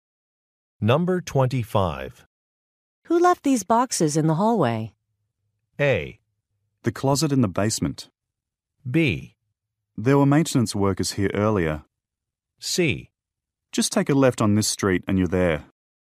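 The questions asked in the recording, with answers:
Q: Who left these boxes in the hallway?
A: B: There were maintenance workers here earlier.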